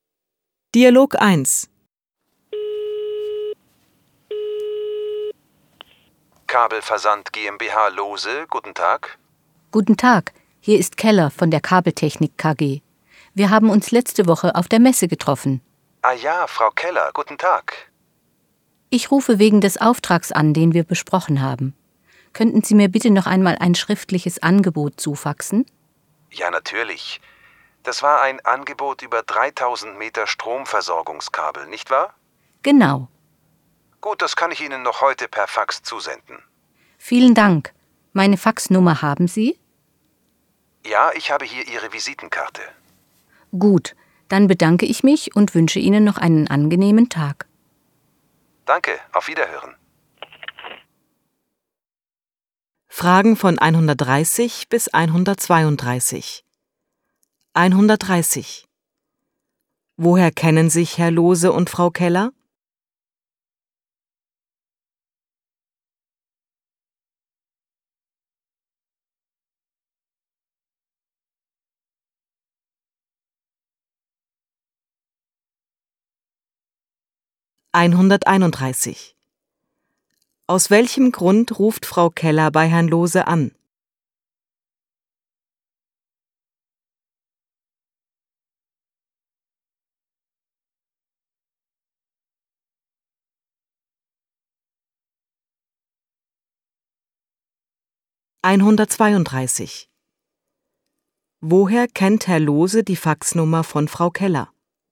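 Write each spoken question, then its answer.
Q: Woher kennen sich Herr Lohse und Frau Keller?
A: Sie haben sich letzte Woche auf der Messe getroffen.

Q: Aus welchem Grund ruft Frau Keller bei Herrn Lohse an?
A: Sie möchte ein schriftliches Angebot per Fax erhalten.

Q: Woher kennt Herr Lohse die Faxnummer von Frau Keller?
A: Von ihrer Visitenkarte.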